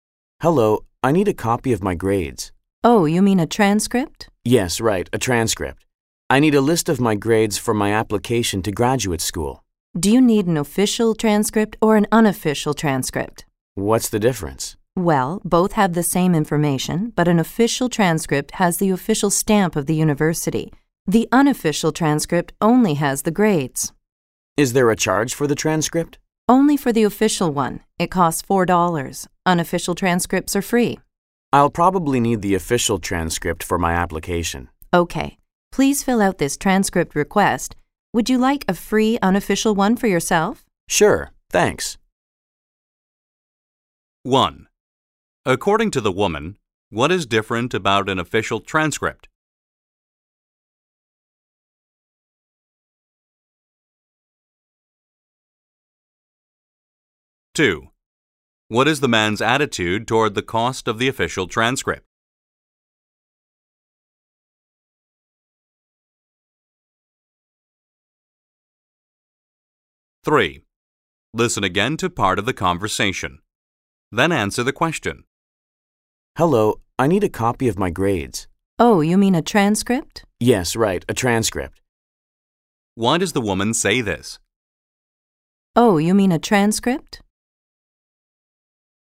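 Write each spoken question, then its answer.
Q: According to the woman, what is different about an official transcript?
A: It has the official stamp of the university.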